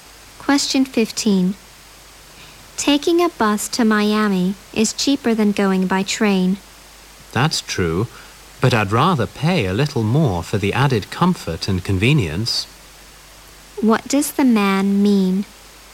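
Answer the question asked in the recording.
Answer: He would rather take the train because it is more comfortable and convenient, even though it costs more.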